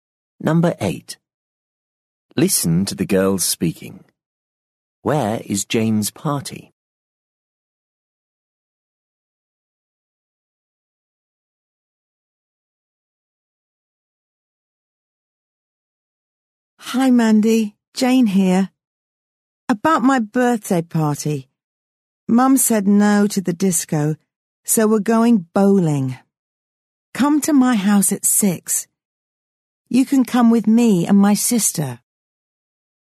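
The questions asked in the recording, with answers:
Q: Where is Jane's party?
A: at the bowling alley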